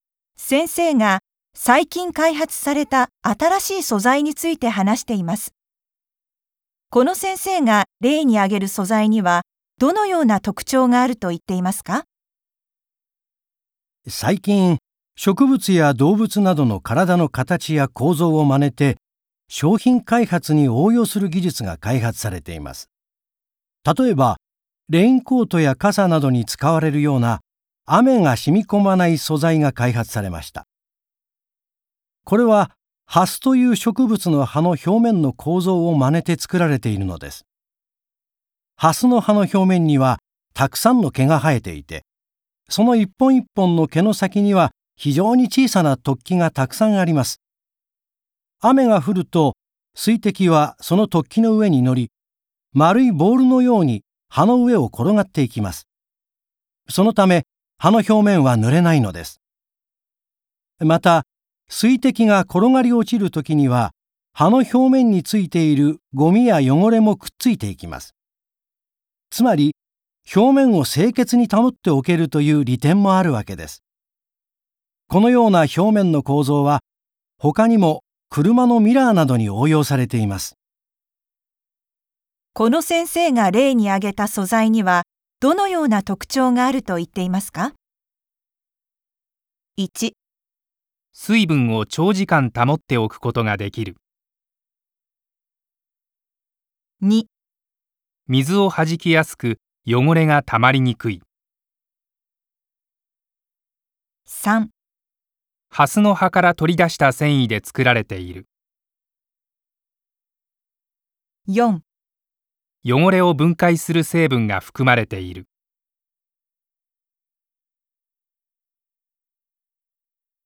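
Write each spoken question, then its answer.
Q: この先生が例に挙げた素材には、どのような特徴があると言っていますか?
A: 2: 水をはじきやすく、汚れがたまりにくい。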